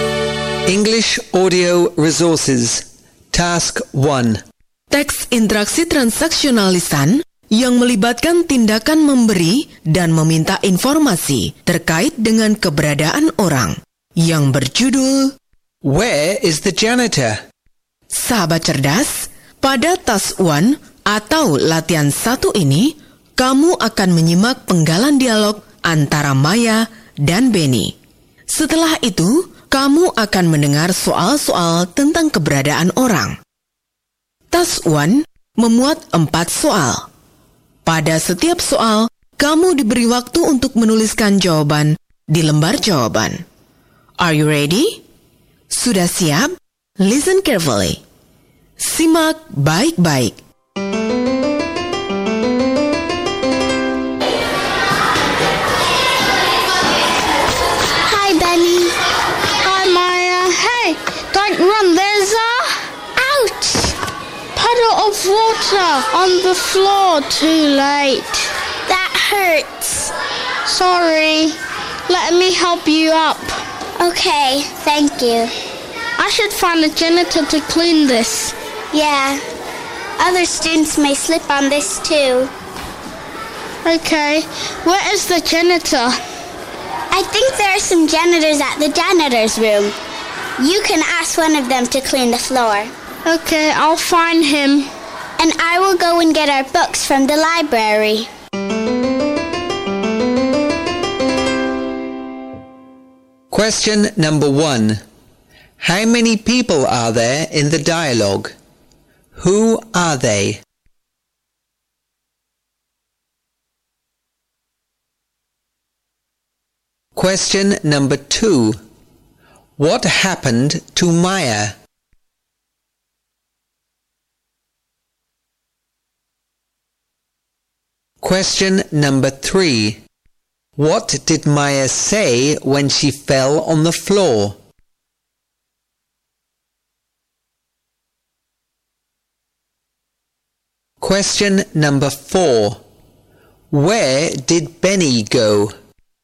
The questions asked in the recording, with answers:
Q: How many people are there in the dialogue? Who are they?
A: Two people. Maya and Benny.

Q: What happened to Maya?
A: She slipped on a puddle of water and fell on the floor.

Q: What did Maya say when she fell on the floor?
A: Ouch, that hurts.

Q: Where did Benny go?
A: He went to the janitor's room.